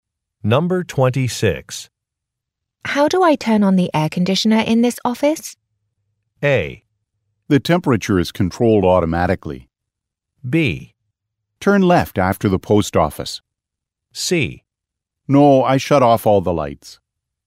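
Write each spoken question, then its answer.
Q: How do I turn on the air conditioner in this office?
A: A: The temperature is controlled automatically.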